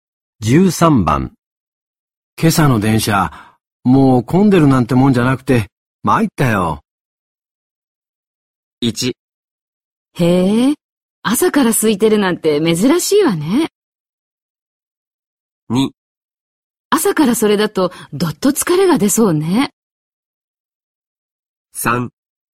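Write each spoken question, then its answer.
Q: 今朝の電車、もう混んでるなんてもんじゃなくて、参ったよ。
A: 2: 朝からそれだと、どっと疲れが出そうね。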